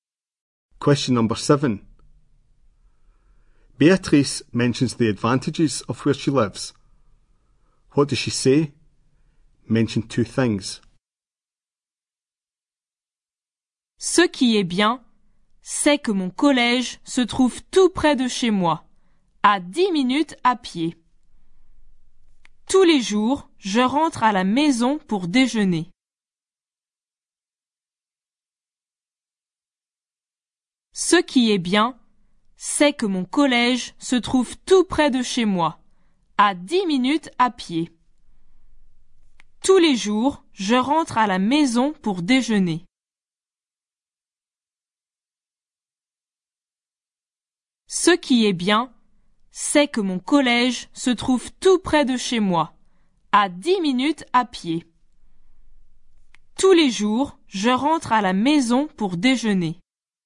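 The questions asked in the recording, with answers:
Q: What does she say? Mention 2 things.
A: Her school is very close, 10 minutes' walk away; she goes home for lunch every day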